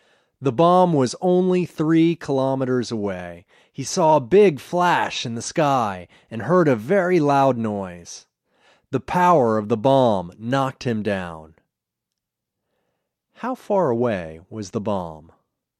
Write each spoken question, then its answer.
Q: How far away was the bomb?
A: The bomb was 3 kilometers away.